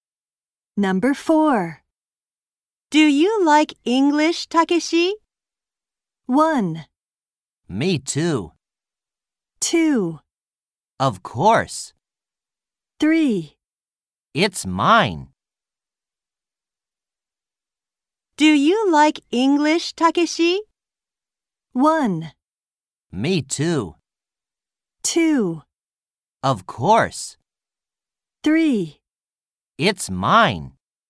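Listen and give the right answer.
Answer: 2: Of course.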